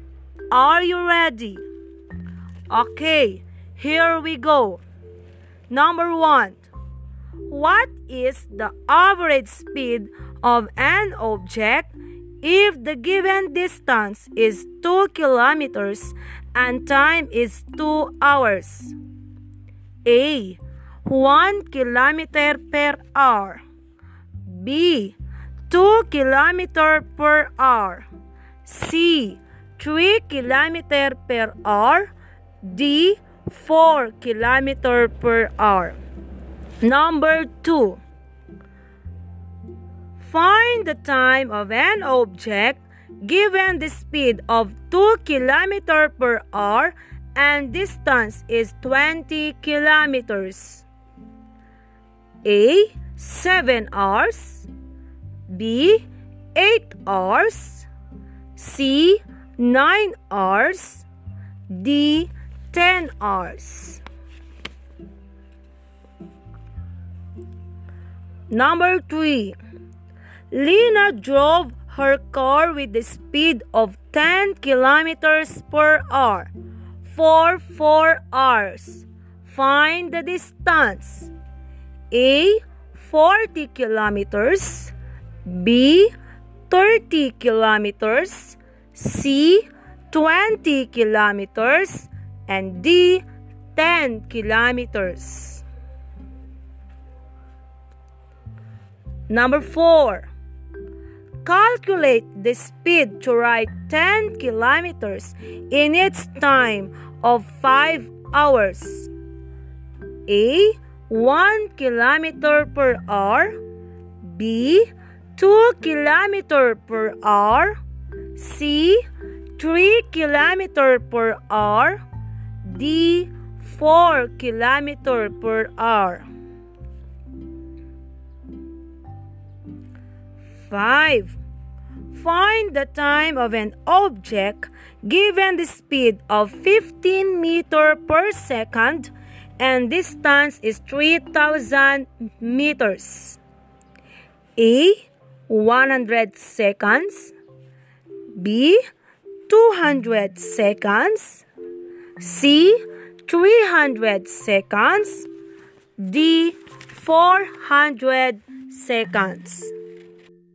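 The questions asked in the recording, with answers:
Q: What is the average speed of an object if the given distance is 2 kilometers and time is 2 hours?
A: A: 1 kilometer per hour

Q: Find the time of an object given the speed of 2 kilometer per hour and distance is 20 kilometers.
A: D: 10 hours

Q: Lena drove her car with the speed of 10 kilometers per hour for 4 hours. Find the distance.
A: A: 40 kilometers

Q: Calculate the speed to ride 10 kilometers in its time of 5 hours.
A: B: 2 kilometers per hour

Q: Find the time of an object given the speed of 15 meters per second and distance is 3,000 meters.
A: B: 200 seconds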